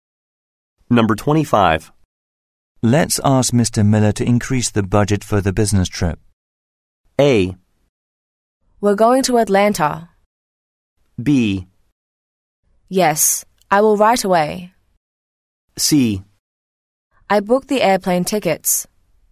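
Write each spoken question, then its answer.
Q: Let's ask Mr. Miller to increase the budget for the business trip.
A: B: Yes, I will right away.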